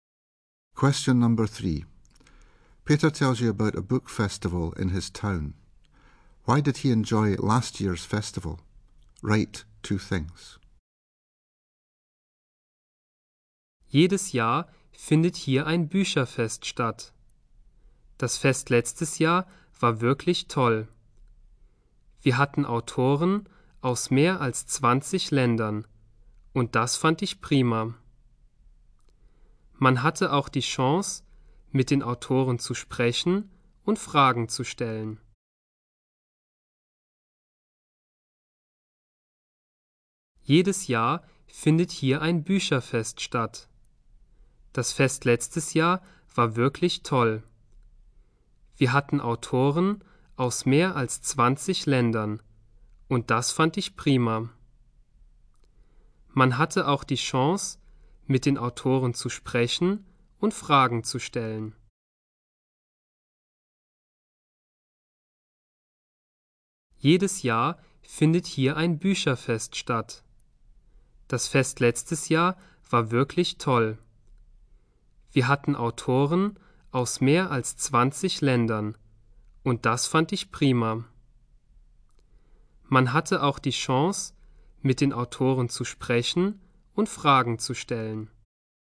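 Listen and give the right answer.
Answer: Authors from more than 20 countries; chance to talk to authors and ask questions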